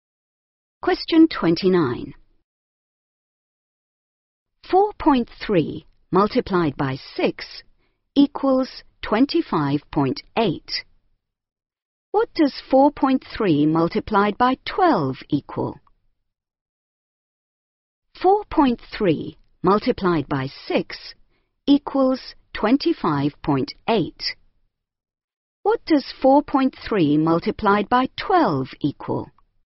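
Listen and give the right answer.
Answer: 51.6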